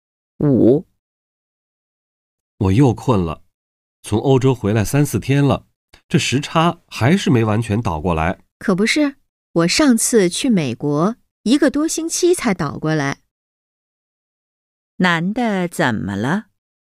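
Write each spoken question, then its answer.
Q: 男的怎么了?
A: 时差还没倒过来,很困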